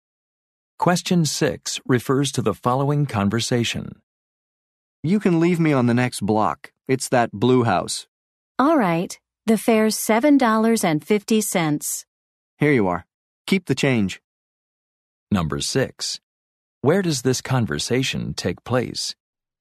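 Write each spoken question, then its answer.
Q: Where does this conversation take place?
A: In a taxi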